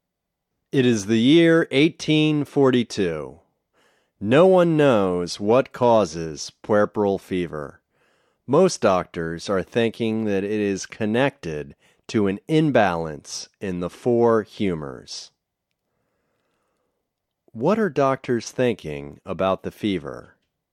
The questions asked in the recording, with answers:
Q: What are doctors thinking about the fever?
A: Doctors are thinking that it is connected to an imbalance in the four humors.